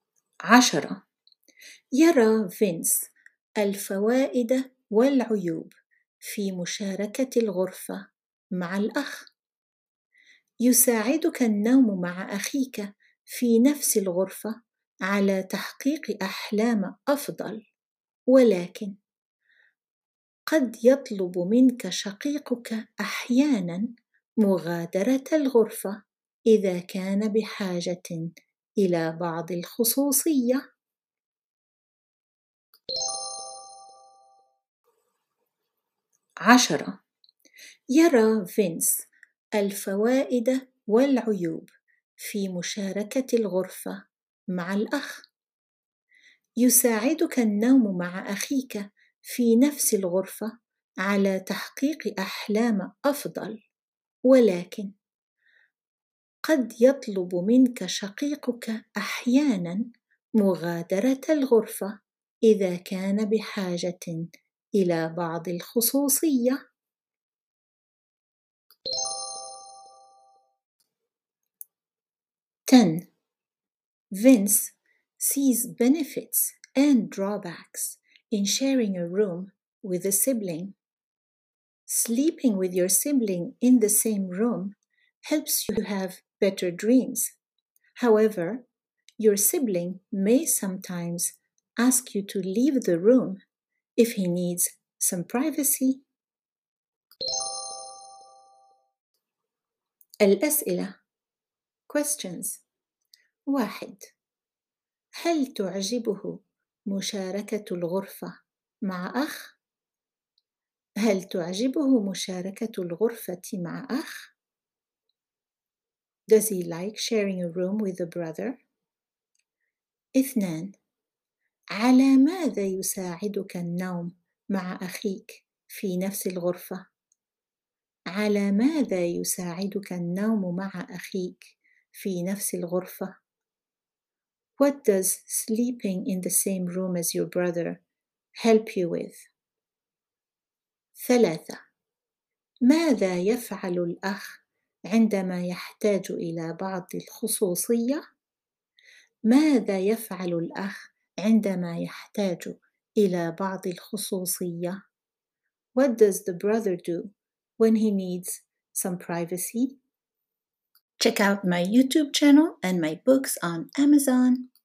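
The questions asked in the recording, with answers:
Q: على ماذا يساعدك النوم مع أخيك في نفس الغرفة؟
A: على تحقيق أحلام أفضل

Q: ماذا يفعل الأخ عندما يحتاج الى بعض الخصوصيه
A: يطلب منك مغادرة الغرفة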